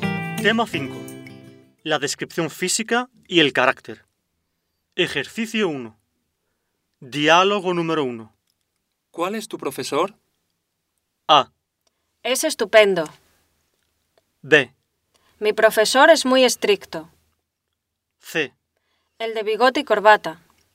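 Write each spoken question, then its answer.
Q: ¿Cuál es tu profesor?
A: C: El de bigote y corbata.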